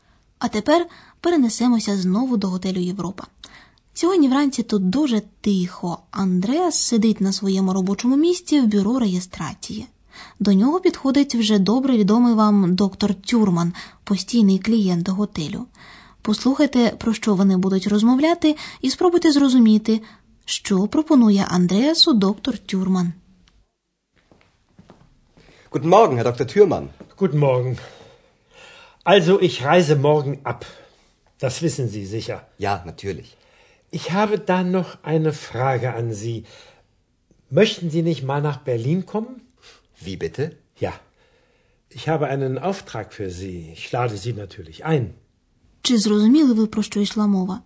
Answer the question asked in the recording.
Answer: Завтра доктор Тюрман виїжджає з готелю і він запитує Андреаса, чи не хотів би той поїхати в Берлін.